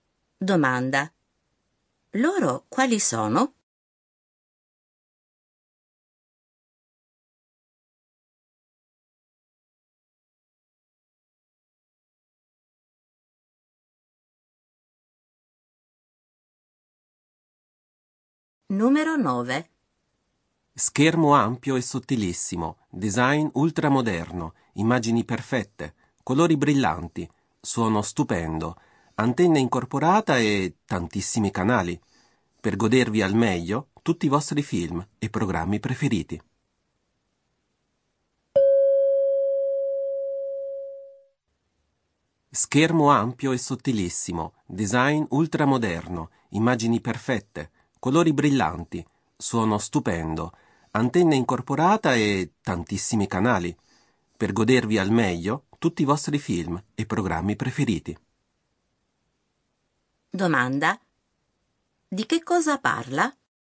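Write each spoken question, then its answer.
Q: Di che cosa parla?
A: Di un televisore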